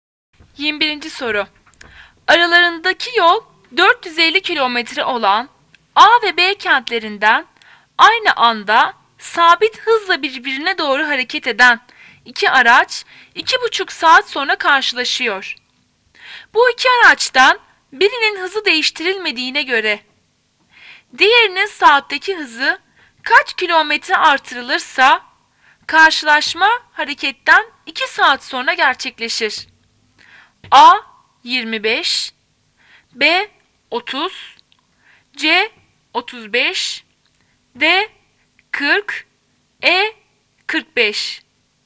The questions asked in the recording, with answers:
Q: Bu iki araçtan birinin hızı değiştirilmediğine göre diğerinin saatteki hızı kaç kilometre artırılırsa karşılaşma hareketten 2 saat sonra gerçekleşir.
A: Cevap E 45.